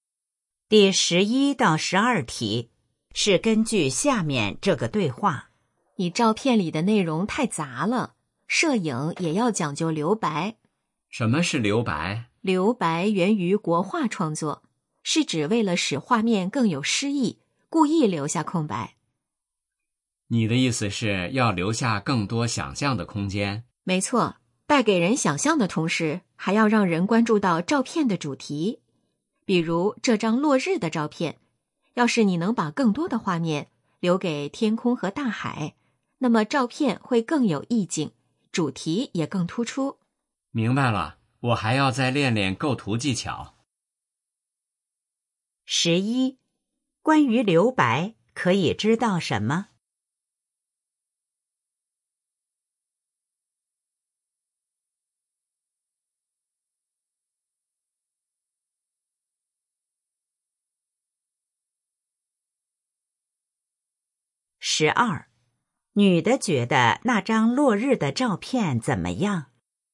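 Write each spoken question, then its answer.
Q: 关于留白,可以知道什么?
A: 源于国画,能给人想象空间并突出主题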